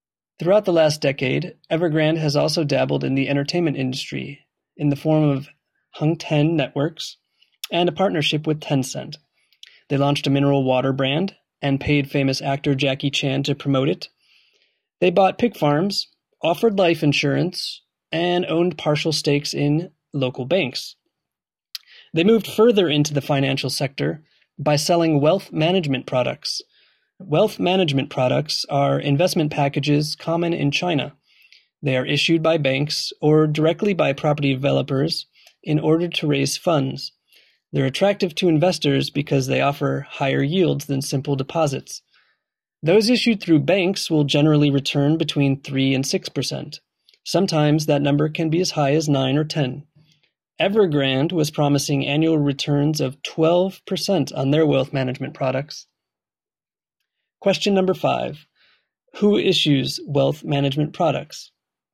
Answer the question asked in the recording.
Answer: Well, generally, these investment packages are issued by banks or directly by property developers.